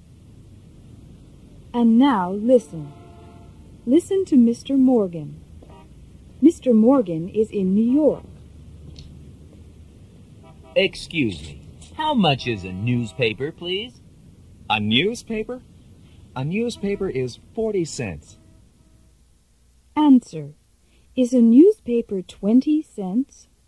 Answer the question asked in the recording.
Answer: No, it's not.